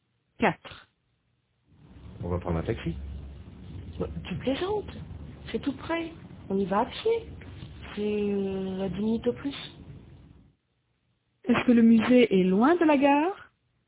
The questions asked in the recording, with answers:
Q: Est-ce que le musée est loin de la gare?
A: Non. Tout près. Il est tout près.